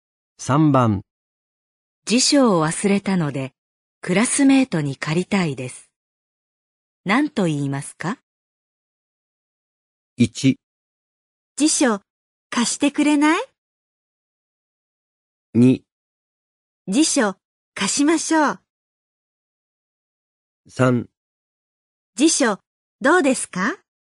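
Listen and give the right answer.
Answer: 1: 辞書貸してくれない?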